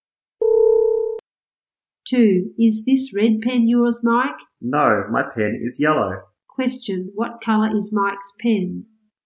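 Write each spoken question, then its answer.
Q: Question, what colour is Mike's pen?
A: Yellow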